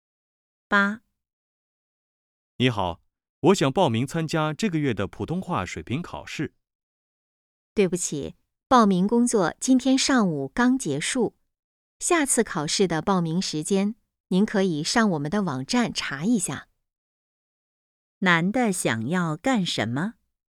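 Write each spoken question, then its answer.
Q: 男的想要干什么?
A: 报名参加普通话水平考试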